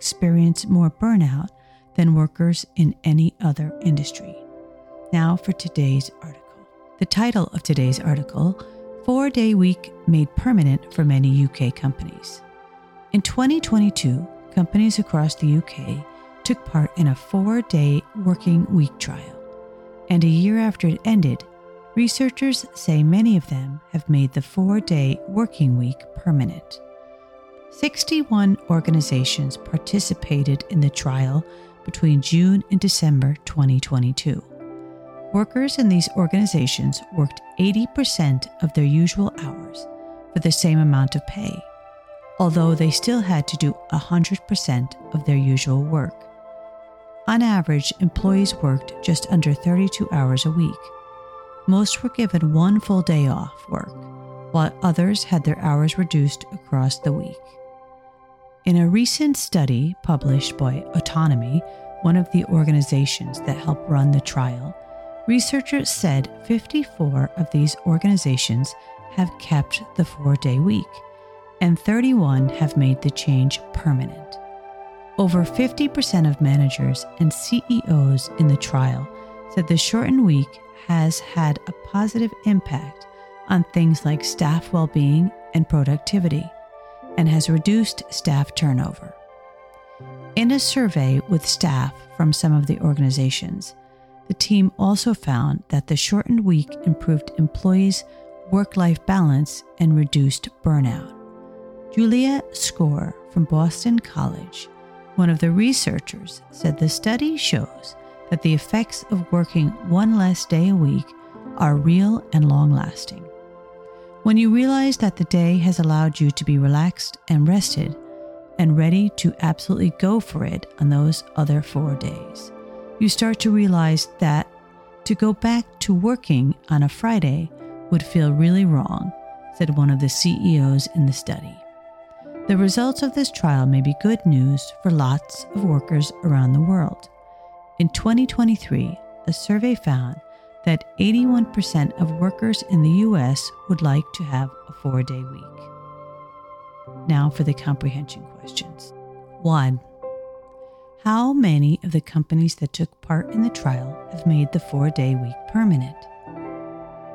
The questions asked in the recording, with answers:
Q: How many of the companies that took part in the trial have made the 4-day week permanent?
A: 54.